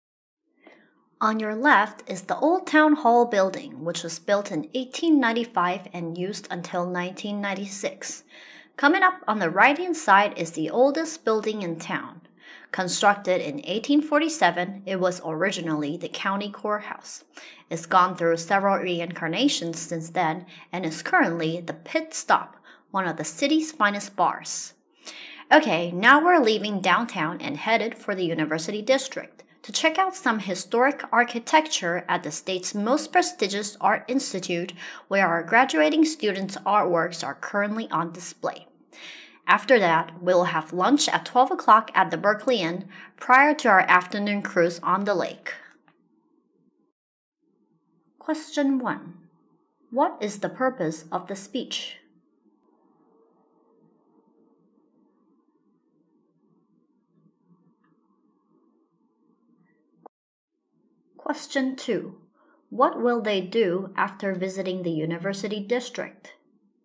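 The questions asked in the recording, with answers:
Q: What is the purpose of the speech?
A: To guide a city tour

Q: What will they do after visiting the University District?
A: Have lunch at the Berkeley Inn at 12 o'clock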